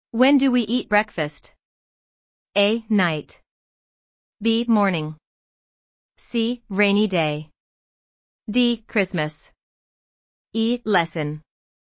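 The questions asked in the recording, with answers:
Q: When do we eat breakfast?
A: B: Morning.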